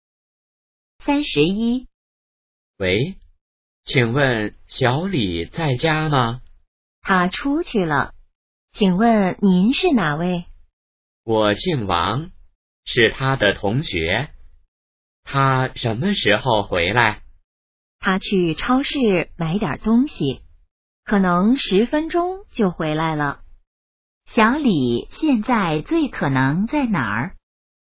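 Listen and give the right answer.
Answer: 超市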